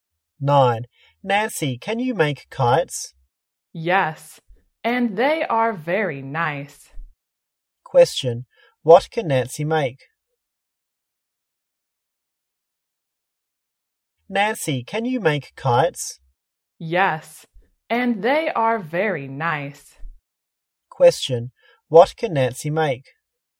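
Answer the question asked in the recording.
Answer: kites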